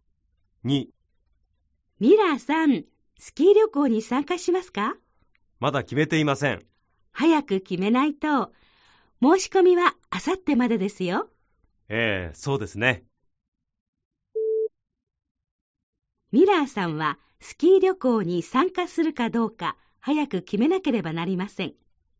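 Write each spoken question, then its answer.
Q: ミラーさんはスキー旅行に参加するかどうか早く決めなければなりません。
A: ○(正しい)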